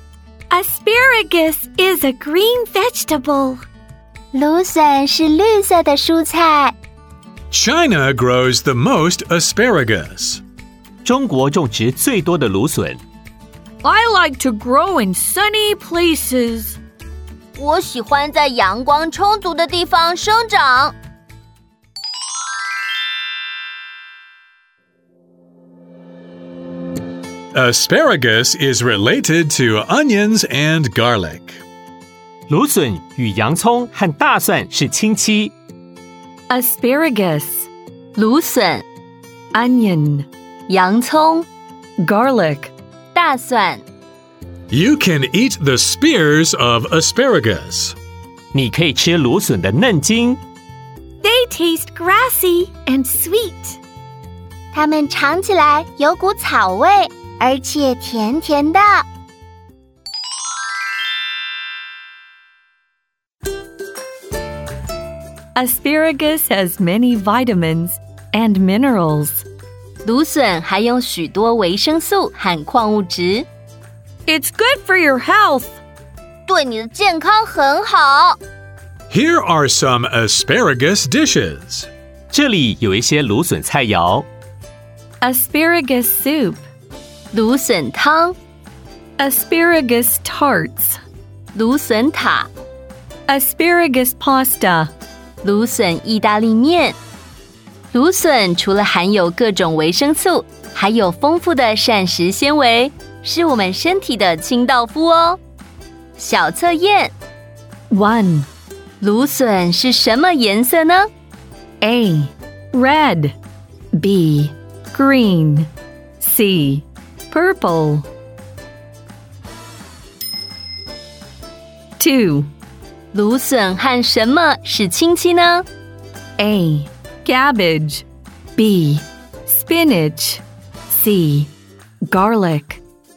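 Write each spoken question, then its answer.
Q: 芦笋是什么颜色呢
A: B: Green

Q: 芦笋和什么是亲戚呢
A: C: Garlic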